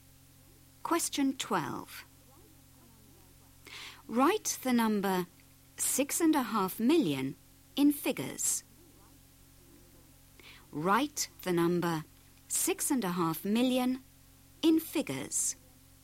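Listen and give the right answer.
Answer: 6500000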